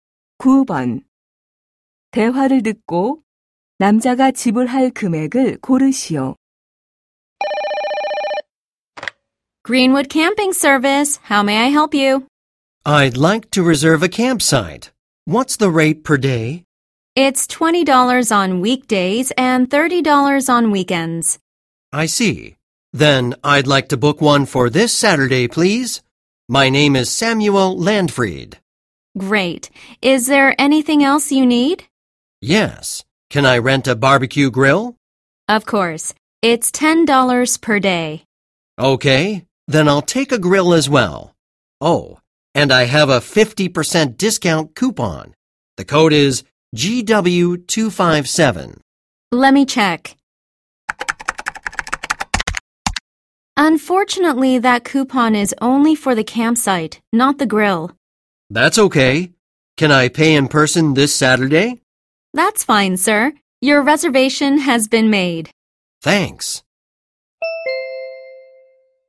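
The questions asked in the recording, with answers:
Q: 대화를 듣고 남자가 지불할 금액을 고르시오.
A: $25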